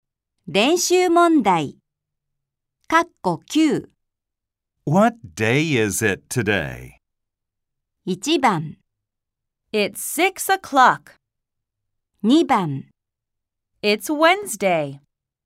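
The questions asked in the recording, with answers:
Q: What day is it today?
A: 2: It's Wednesday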